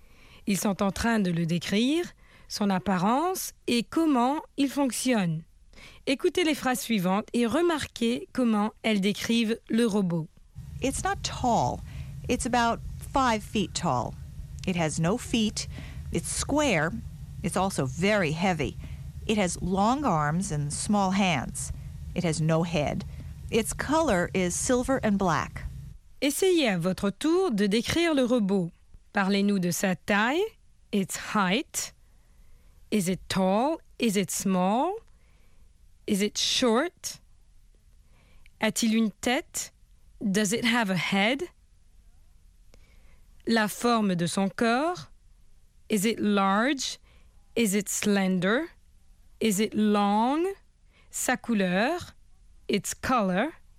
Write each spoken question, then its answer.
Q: Is it tall?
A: not tall

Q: Does it have a head?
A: no head